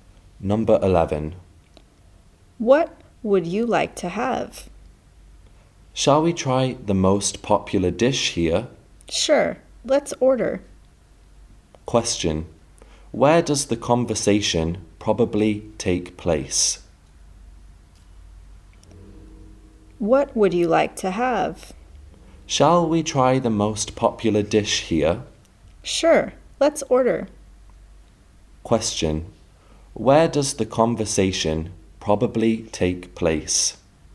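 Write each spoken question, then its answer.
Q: Where does the conversation probably take place?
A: In a restaurant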